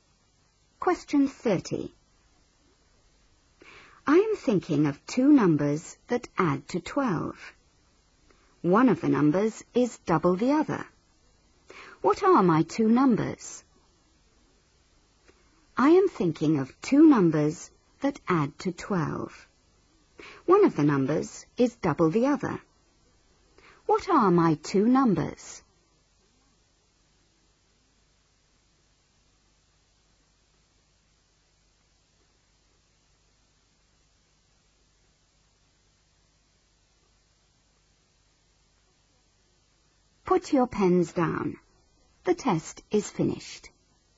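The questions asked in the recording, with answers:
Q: What are my 2 numbers?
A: 4 and 8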